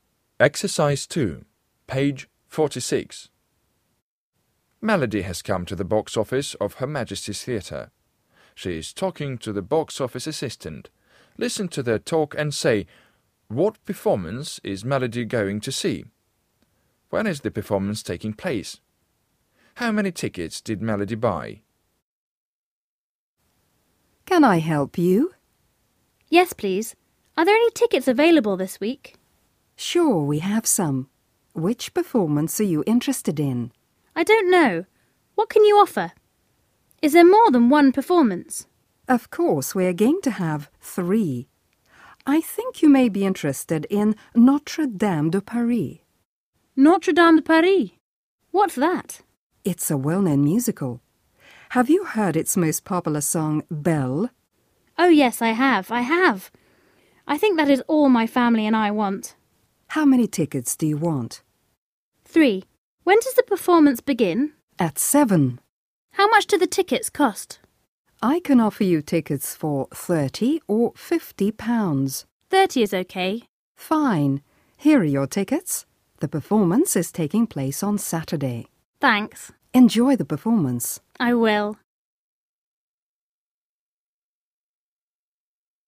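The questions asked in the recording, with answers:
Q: what performance is Melody going to see?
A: Notre Dame de Paris, a musical

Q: When is the performance taking place?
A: On Saturday at 7

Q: How many tickets did Melody buy?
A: Three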